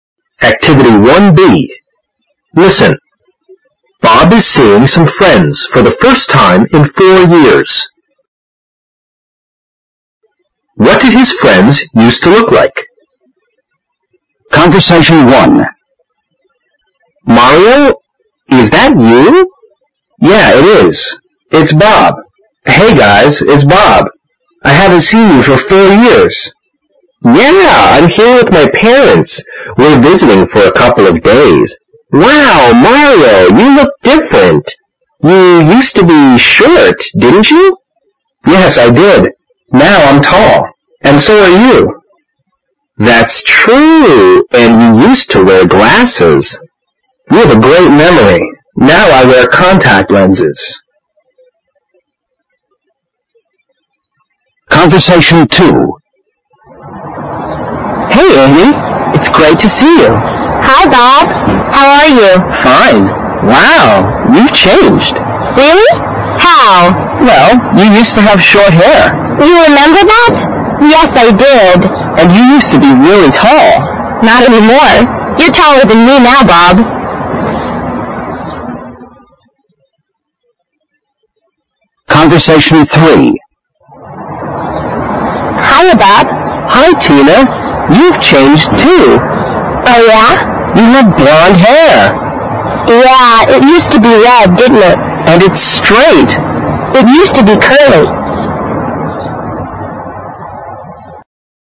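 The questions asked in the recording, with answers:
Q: What did his friends used to look like?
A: Mario used to be short and wear glasses; Andy used to have short hair and be really tall; Tina used to have red, curly hair.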